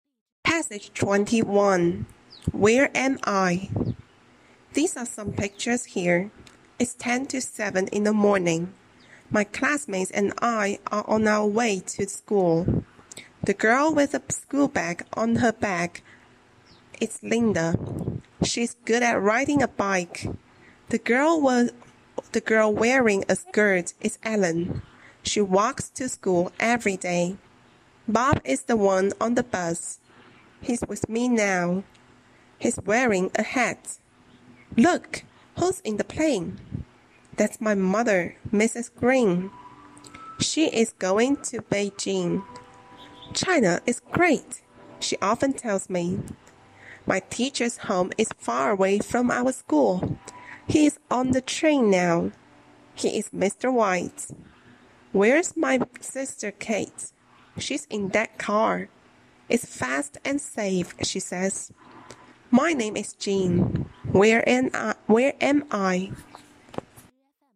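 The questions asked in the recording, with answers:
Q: Where am I?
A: On the bus.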